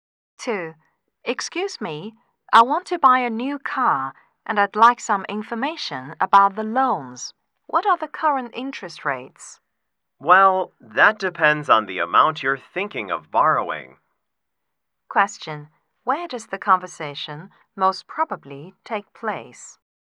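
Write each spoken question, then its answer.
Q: Where does the conversation most probably take place?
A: At a bank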